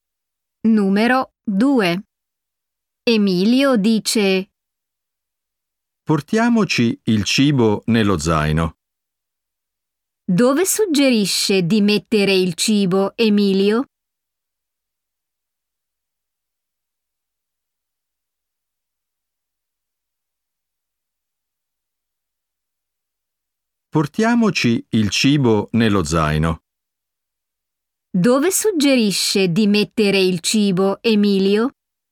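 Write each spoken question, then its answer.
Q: Dove suggerisce di mettere il cibo, Emilio?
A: Nello zaino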